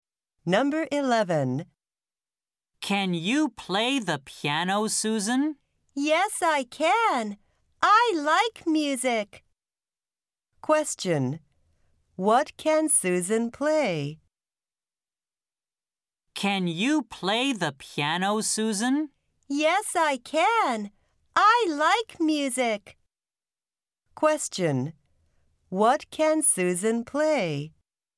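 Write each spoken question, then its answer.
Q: What can Susan play?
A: The piano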